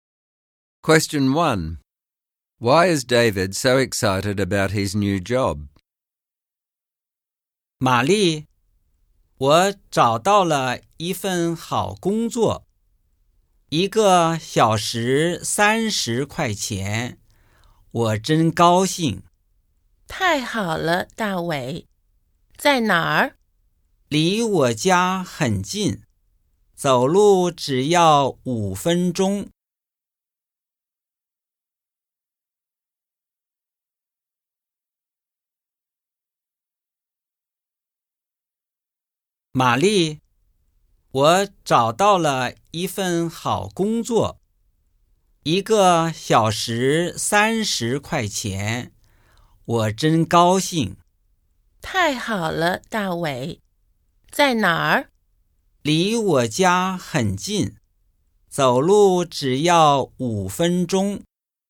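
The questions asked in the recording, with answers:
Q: Why is David so excited about his new job?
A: It pays 30 dollars an hour and it is only a 5-minute walk from his home.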